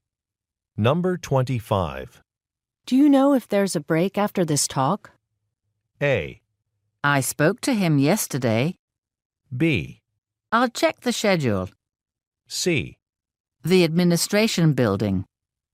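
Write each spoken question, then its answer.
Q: Do you know if there's a break after this talk?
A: B: I'll check the schedule.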